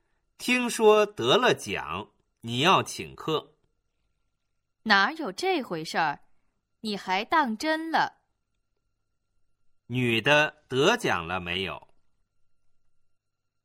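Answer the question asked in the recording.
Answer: 没有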